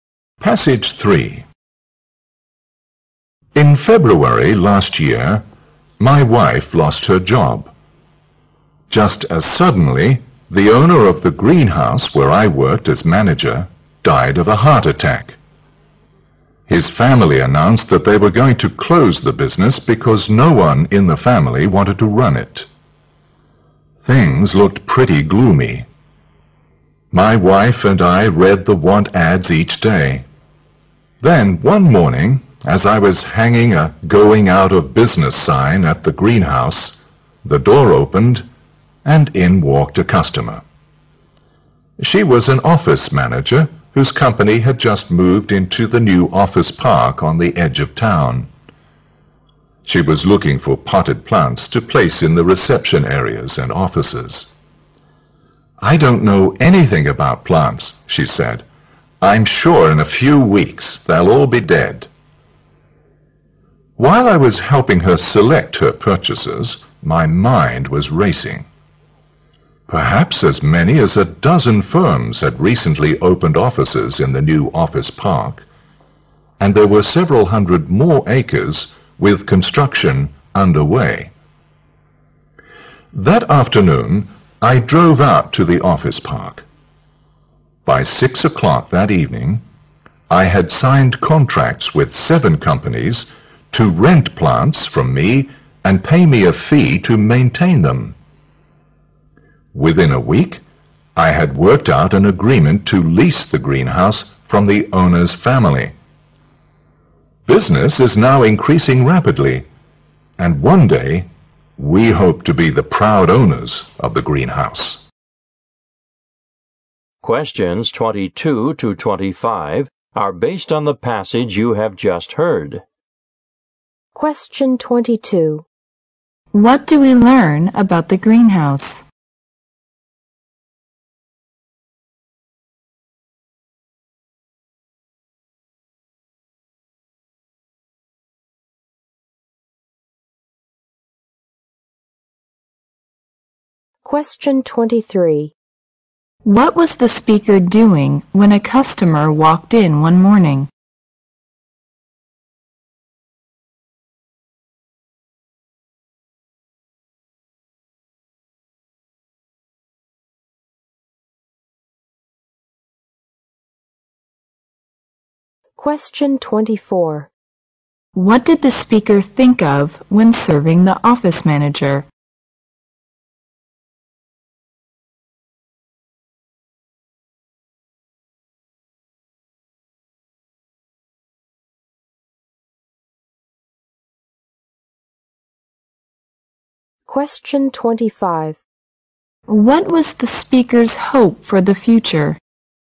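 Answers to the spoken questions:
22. It was going to close after the owner died
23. Hanging a going-out-of-business sign
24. Renting and maintaining plants for the firms in the office park
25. To own the greenhouse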